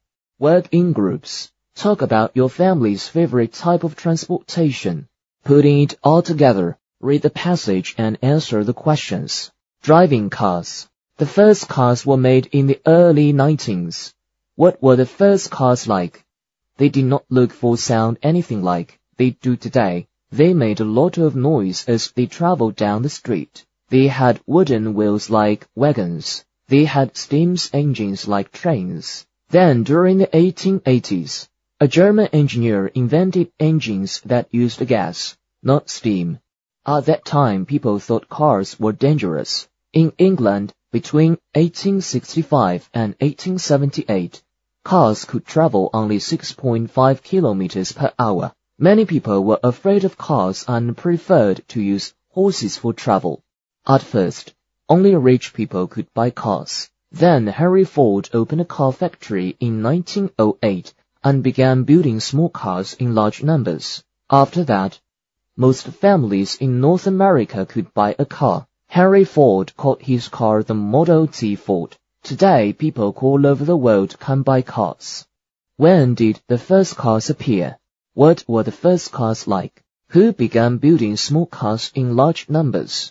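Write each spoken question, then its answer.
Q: What were the first cars like?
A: They were noisy, had wooden wheels like wagons and steam engines like trains

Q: Who began building small cars in large numbers?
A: Henry Ford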